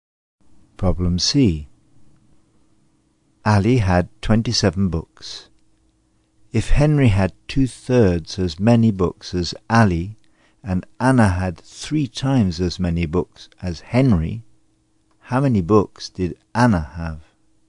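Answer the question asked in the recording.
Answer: 54 books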